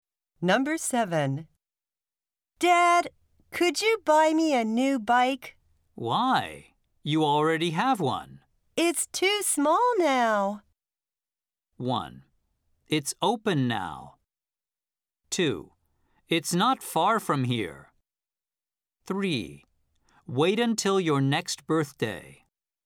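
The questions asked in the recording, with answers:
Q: It's too small now.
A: 3: Wait until your next birthday.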